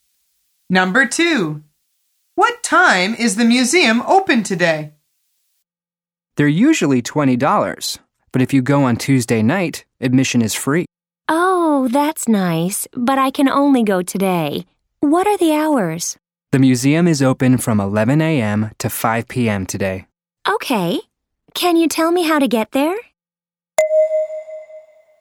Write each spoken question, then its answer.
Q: What time is the museum open today?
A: The answer is from 11 a.m.